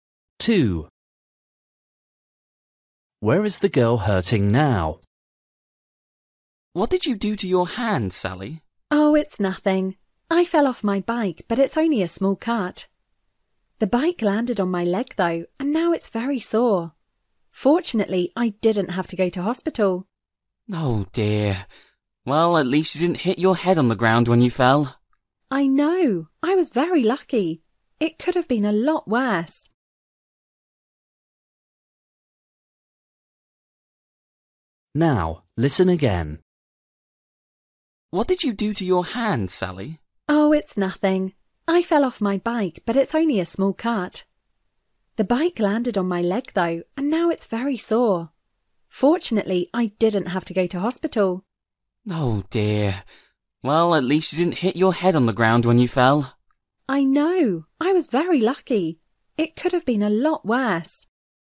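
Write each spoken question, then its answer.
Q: Where is the girl hurting now?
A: her leg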